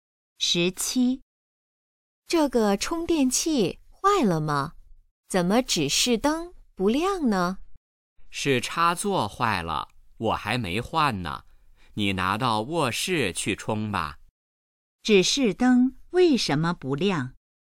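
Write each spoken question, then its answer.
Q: 指示灯为什么不亮?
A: 插座坏了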